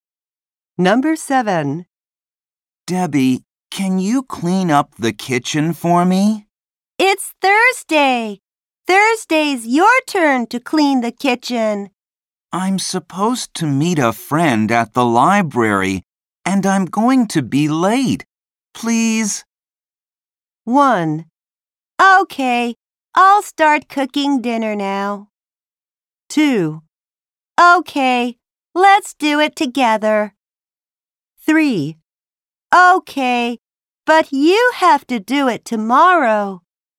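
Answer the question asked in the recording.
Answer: 3: Okay, but you have to do it tomorrow.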